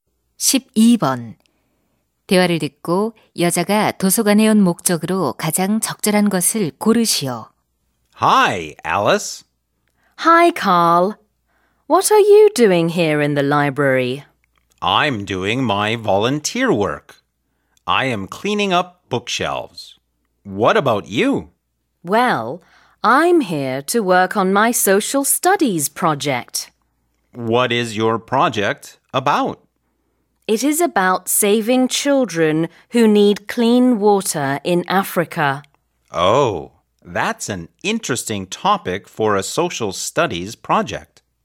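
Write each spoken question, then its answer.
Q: 대화를 듣고 여자가 도서관에 온 목적으로 가장 적절한 것을 고르시오.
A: 사회 과제를 하기 위해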